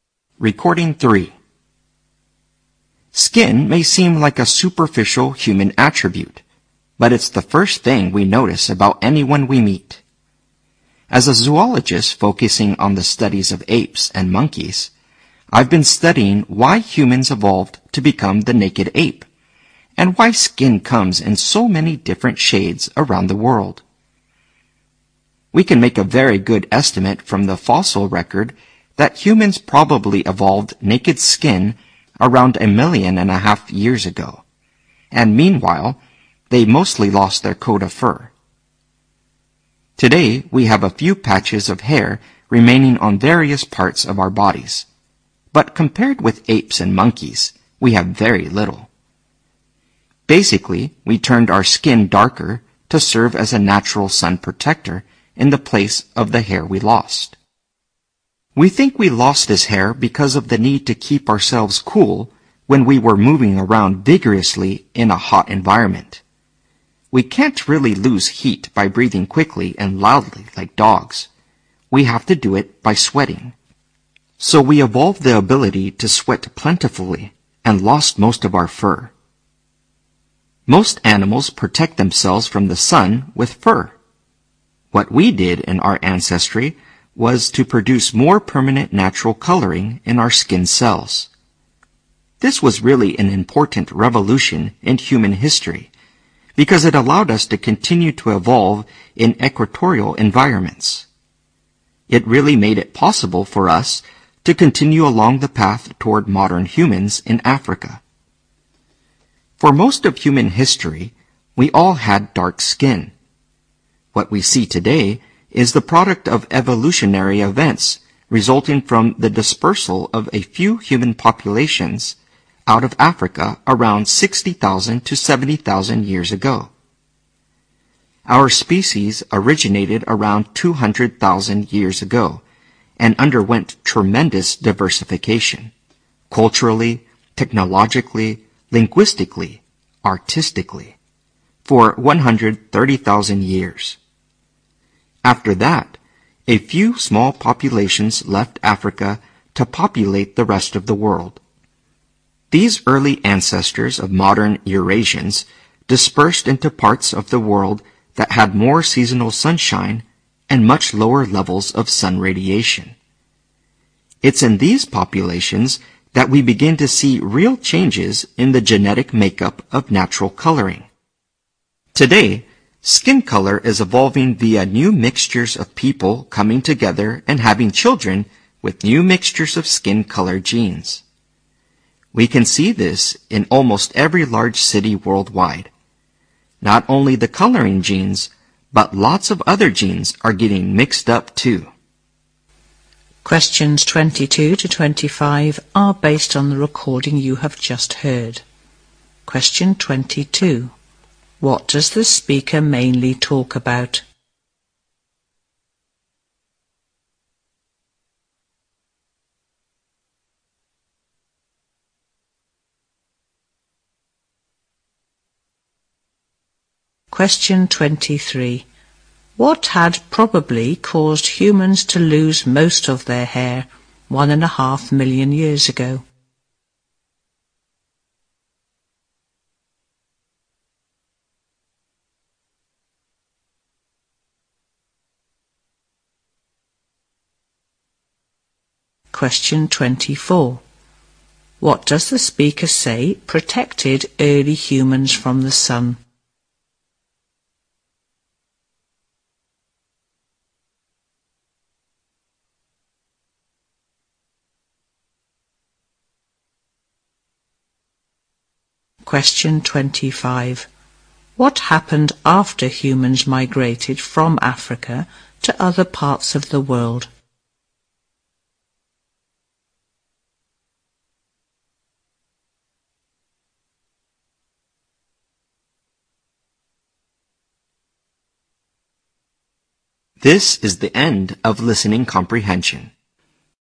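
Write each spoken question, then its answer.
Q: What does the speaker mainly talk about?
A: The evolution of human skin and its color

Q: What had probably caused humans to lose most of their hair 1.5 million years ago?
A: The need to keep cool while moving vigorously in a hot environment

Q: What does the speaker say protected early humans from the sun?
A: Darker skin coloring

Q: What happened after humans migrated from Africa to other parts of the world?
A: Their skin coloring genes began to change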